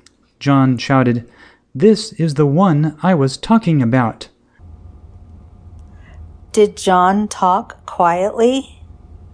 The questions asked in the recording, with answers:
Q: Did John talk quietly?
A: No, John shouted.